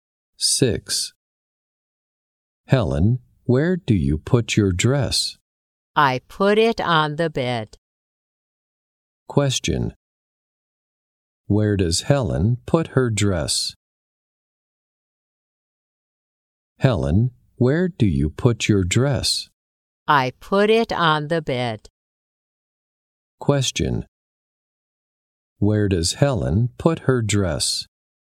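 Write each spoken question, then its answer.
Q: Where does Helen put her dress?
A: On the bed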